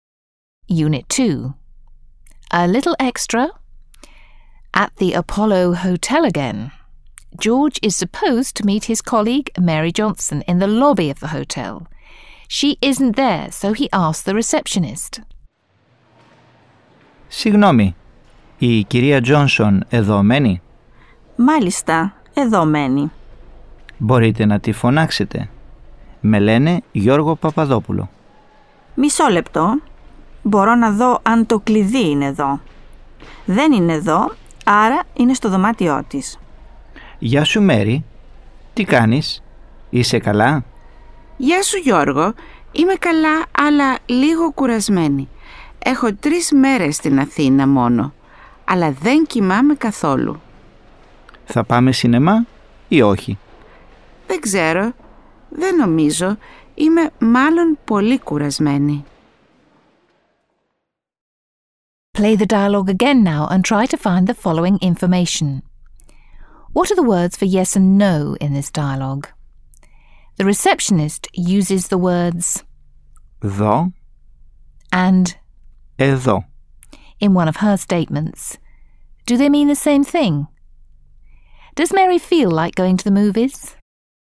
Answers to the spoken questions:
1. Μάλιστα. Stands for yes and όχι. Stands for no.
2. Are two different words meaning to see and hear, respectively.
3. Mary does not feel like going to the movies. She said she is rather tired.